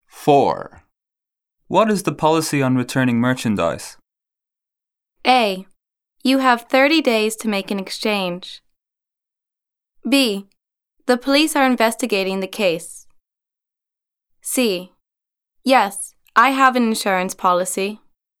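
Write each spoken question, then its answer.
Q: What is the policy on returning merchandise?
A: A: You have 30 days to make an exchange.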